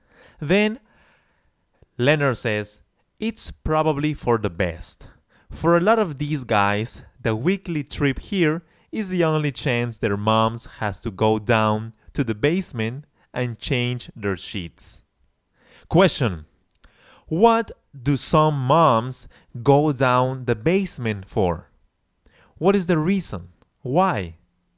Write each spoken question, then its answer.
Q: What do some moms go down the basement for?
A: moms go down the basement to change their son's sheets.